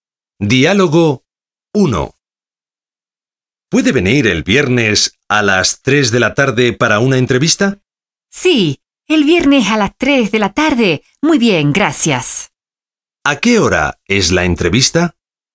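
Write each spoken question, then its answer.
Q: ¿A qué hora es la entrevista?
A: A las 3 de la tarde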